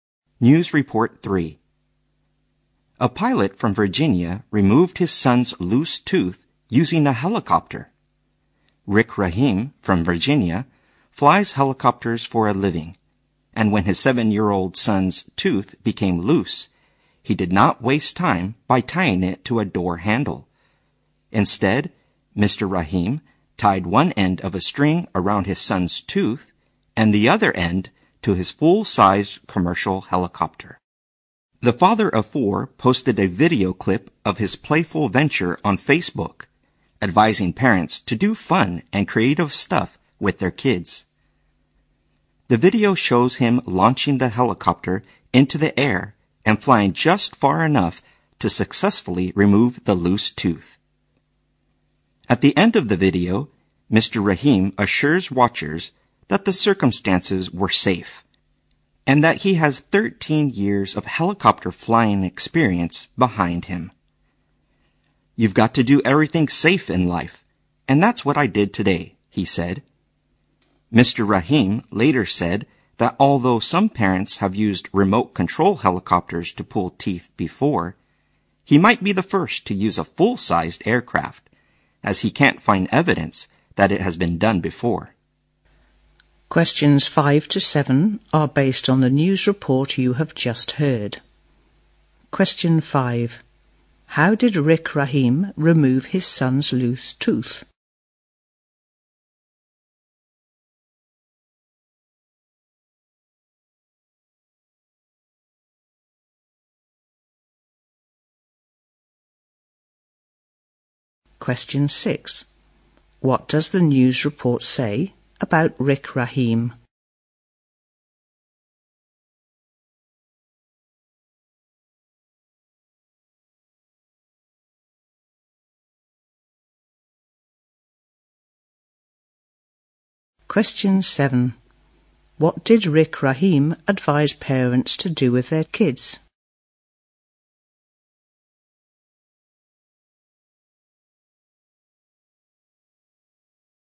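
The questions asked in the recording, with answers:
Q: How did Rick Rahim remove his son's loose tooth?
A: He tied it with a string to his helicopter and flew it

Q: What did Rick Rahim advise parents to do with their kids?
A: Do fun and creative stuff with them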